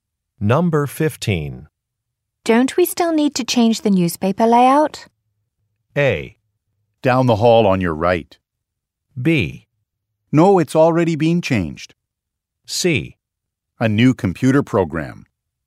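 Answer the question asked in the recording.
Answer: B: No, it's already been changed.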